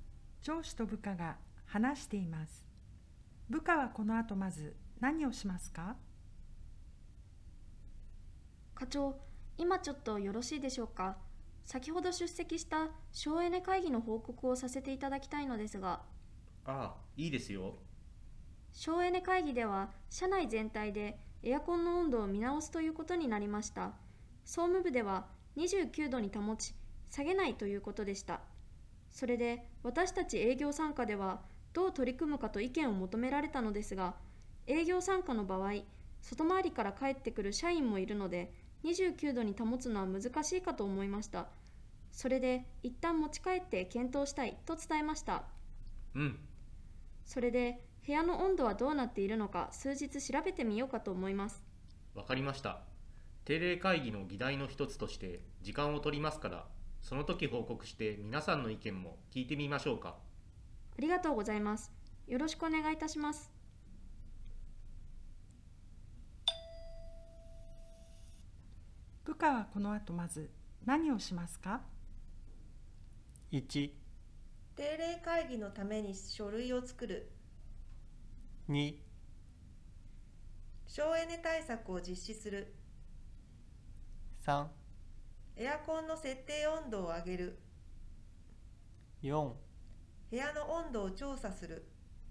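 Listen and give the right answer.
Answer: 4: 部屋の温度を調査する。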